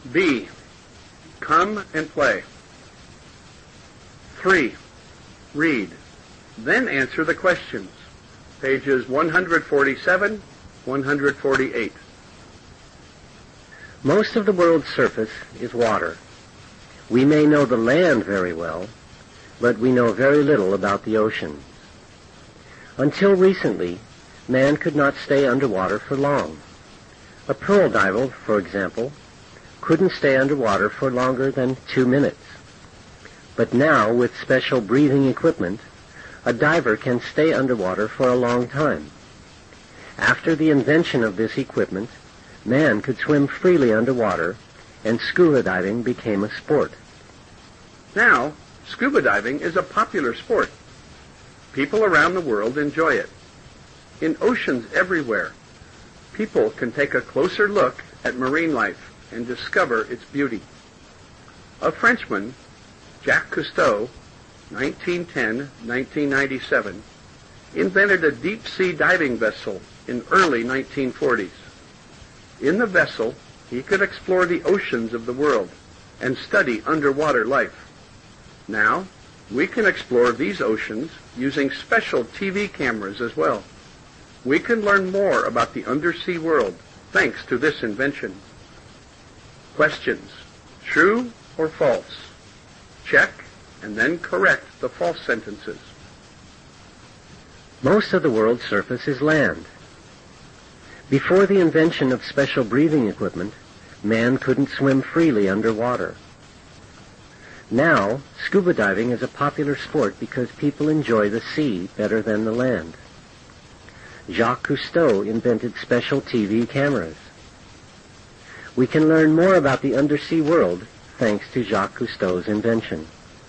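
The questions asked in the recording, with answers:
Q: Most of the world's surface is land.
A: False: most of the world's surface is water.

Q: Before the invention of special breathing equipment, man couldn't swim freely underwater.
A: True

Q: Jacques Cousteau invented special TV cameras.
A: False: he invented a deep-sea diving vessel.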